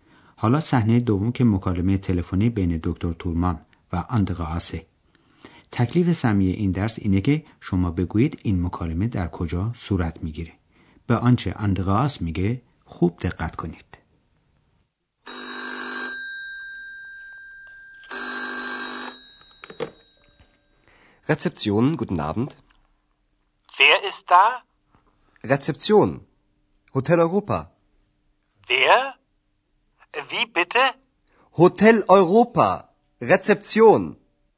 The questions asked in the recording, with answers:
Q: تکلیف سمی این درس اینه که شما بگویید این مکالمه در کجا صورت میگیره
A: اندراس گوشی رو برمیداره و میگه که اونجا رسپسیونه چون که اندراس در رسپسیون هتل اروپا کار میکنه